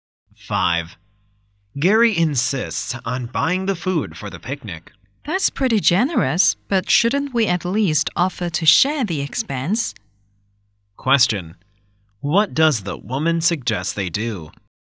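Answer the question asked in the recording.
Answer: Share the cost of the picnic food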